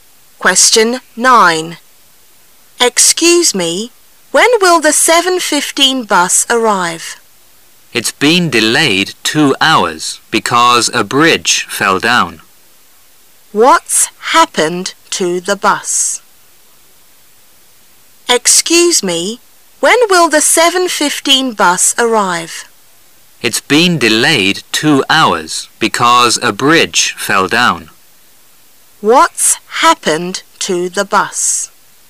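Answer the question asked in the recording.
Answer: It's been delayed 2 hours because a bridge fell down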